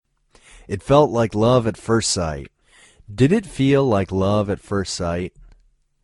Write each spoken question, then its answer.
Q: Did it feel like love at first sight?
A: Yes, it felt like love at first sight.